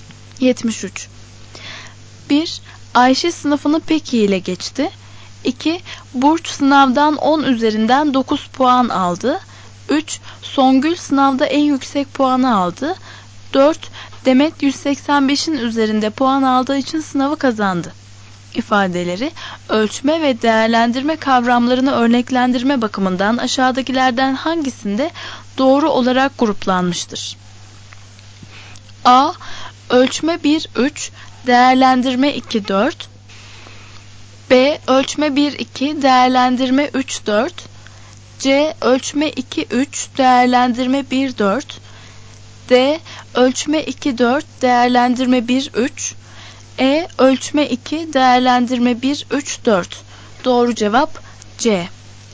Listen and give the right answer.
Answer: Doğru cevap C.